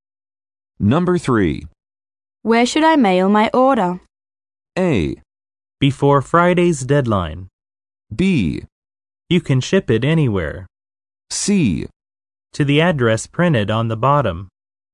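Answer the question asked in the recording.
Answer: C: To the address printed on the bottom.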